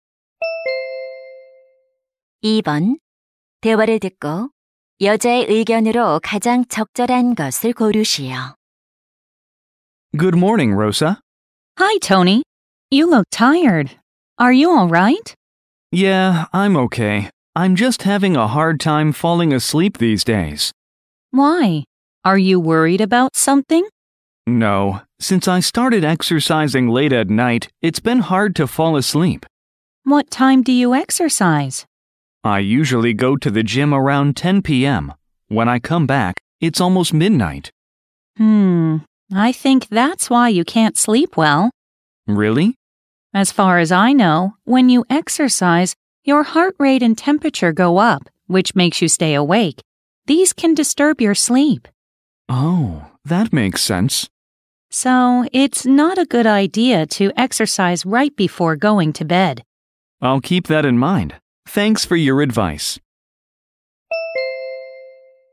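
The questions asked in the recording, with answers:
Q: 대화를 듣고 여자의 의견으로 가장 적절한 것을 고르시오.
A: 잠자리에 들기 직전에 운동하는 것은 좋지 않다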